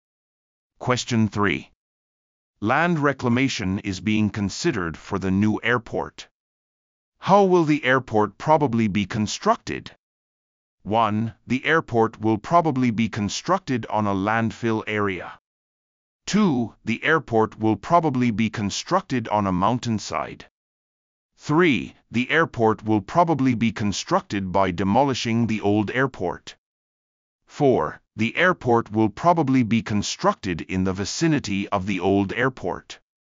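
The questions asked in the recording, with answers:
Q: How will the airport probably be constructed?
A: 1: The airport will probably be constructed on a landfill area.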